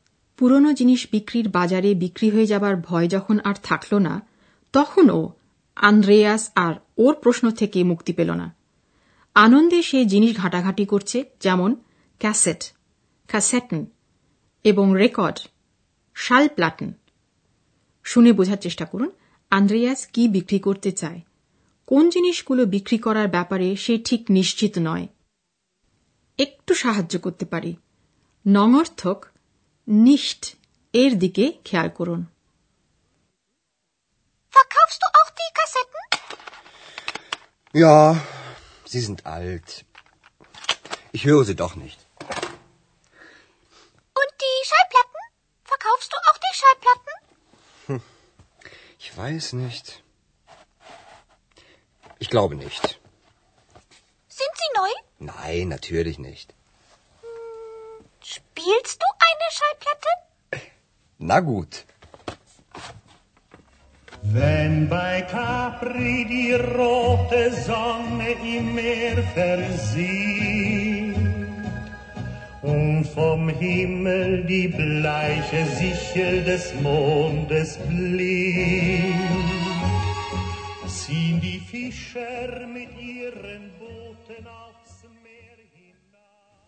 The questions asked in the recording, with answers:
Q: আন্দ্রেয়াস কি বিক্রি করতে চায়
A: আন্দ্রেয়াস ক্যাসেটগুলো বিক্রি করে দিতে চায়

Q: কোন জিনিসগুলো বিক্রি করার ব্যাপারে সে ঠিক নিশ্চিত নয়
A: রেকর্ডগুলো বিক্রি করবে ki na, সে ব্যাপারে সে নিশ্চিত নয়